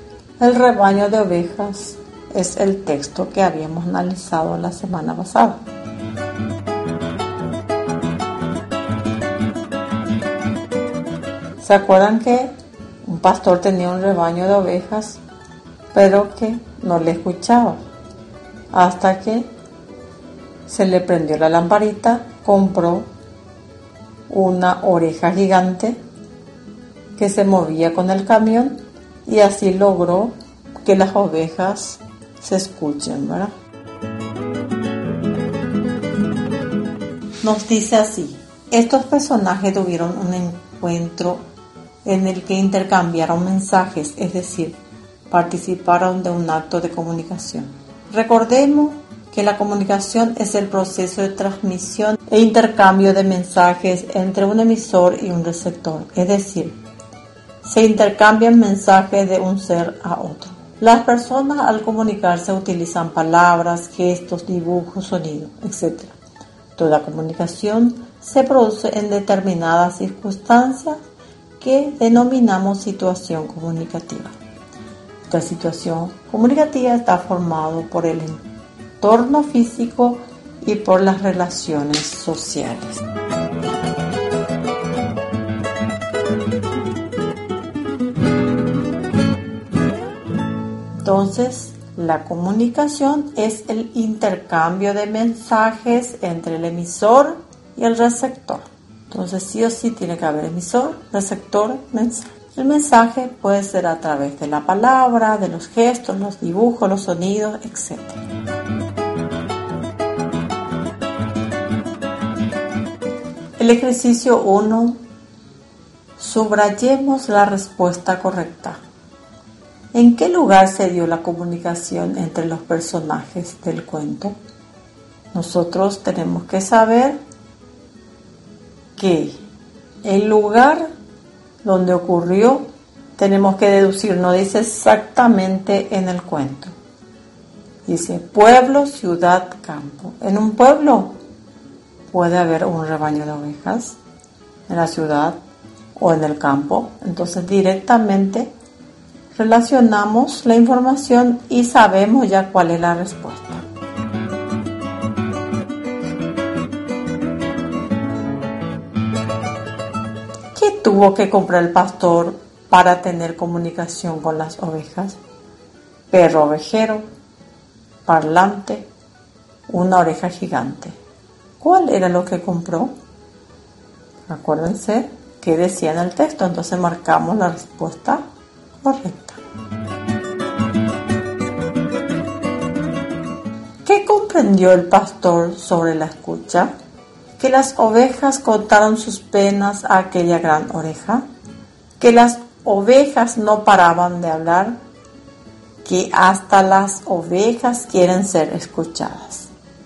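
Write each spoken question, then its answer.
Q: ¿Qué tuvo que comprar el pastor para tener comunicación con las ovejas?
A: una oreja gigante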